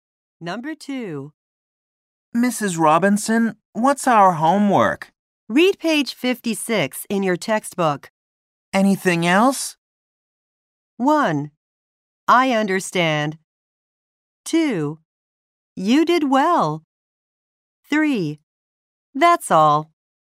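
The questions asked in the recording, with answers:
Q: Anything else?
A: 3: That's all.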